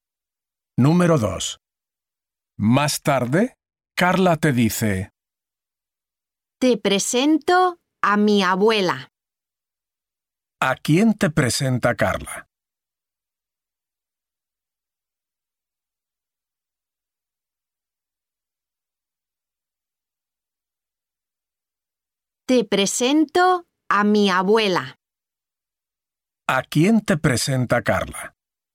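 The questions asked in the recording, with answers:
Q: ¿A quién te presenta Carla?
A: A su abuela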